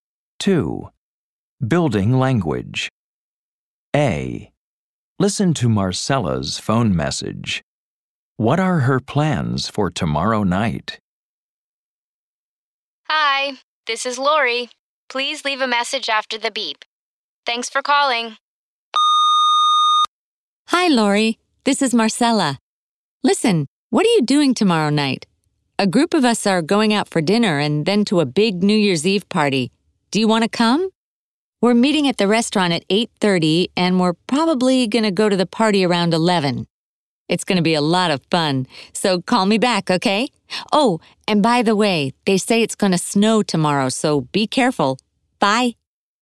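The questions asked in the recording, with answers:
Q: What are her plans for tomorrow night?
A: Going out for dinner with a group, then to a big New Year's Eve party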